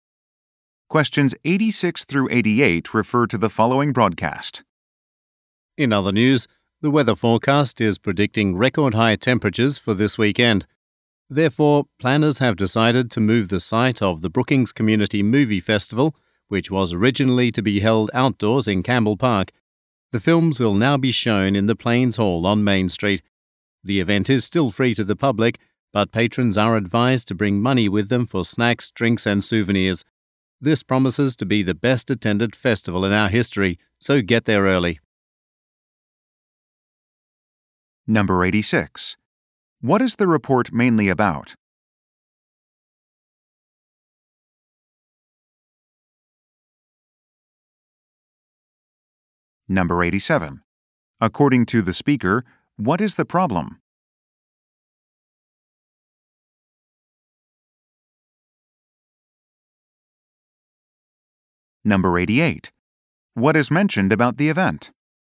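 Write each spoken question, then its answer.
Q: What is the report mainly about?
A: A community movie festival changing location

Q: According to the speaker, what is the problem?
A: Record high temperatures are forecast

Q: What is mentioned about the event?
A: It is free to the public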